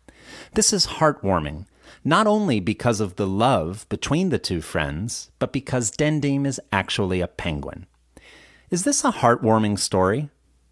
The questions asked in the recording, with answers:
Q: Is this a heartwarming story?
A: Yes, it is. It is a heartwarming story.